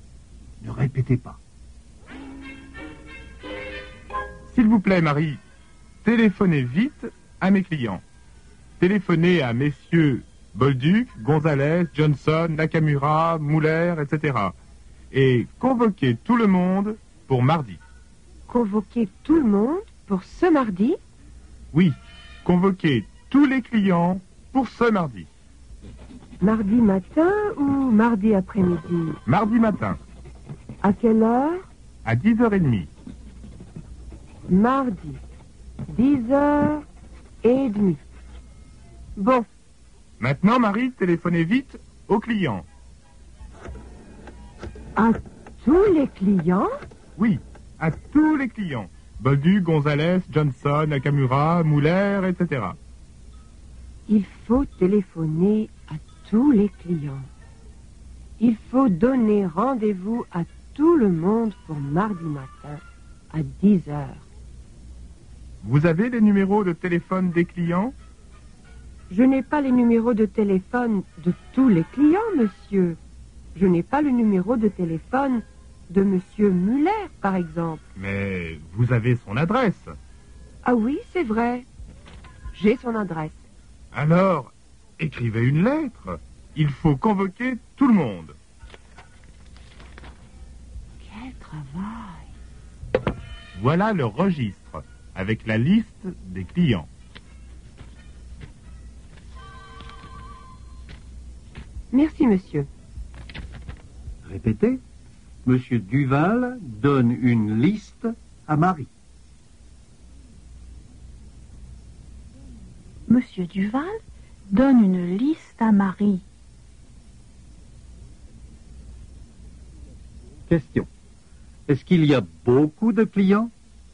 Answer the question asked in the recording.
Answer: Oui, il y a beaucoup de clients.